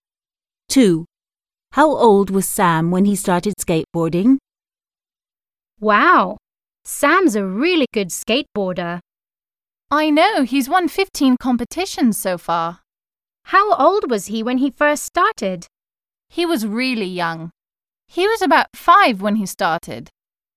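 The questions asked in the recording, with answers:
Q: How old was Sam when he started skateboarding?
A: about 5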